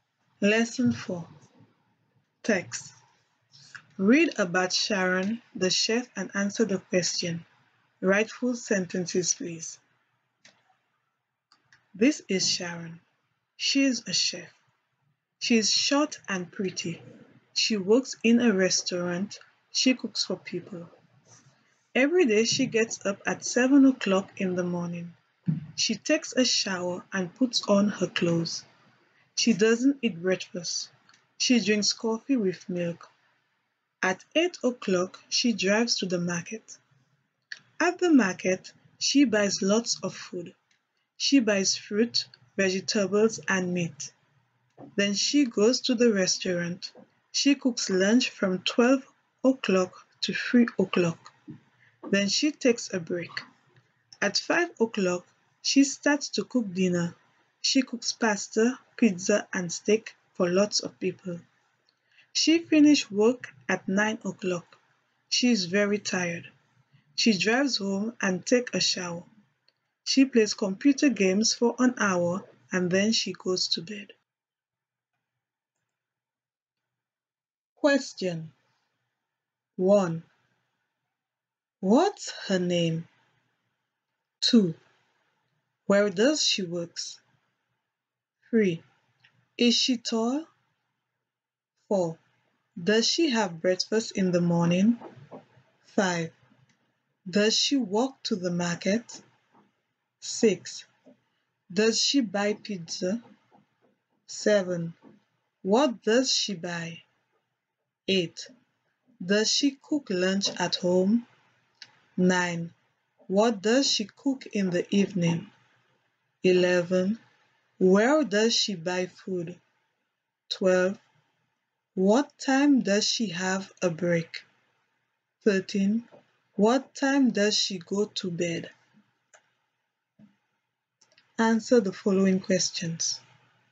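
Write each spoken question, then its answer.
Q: What's her name?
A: Her name is Sharon.

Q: Where does she work?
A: She works in a restaurant.

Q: Is she tall?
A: No, she isn't. She is short.

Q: Does she have breakfast in the morning?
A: No, she doesn't.

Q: Does she walk to the market?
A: No, she doesn't. She drives to the market.

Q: Does she buy pizza?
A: No, she doesn't.

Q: What does she buy?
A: She buys fruit, vegetables, and meat.

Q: Does she cook lunch at home?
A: No, she doesn't. She cooks lunch at the restaurant.

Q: What does she cook in the evening?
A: She cooks pasta, pizza, and steak.

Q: Where does she buy food?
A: She buys food at the market.

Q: What time does she have a break?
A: She has a break at 3 o'clock.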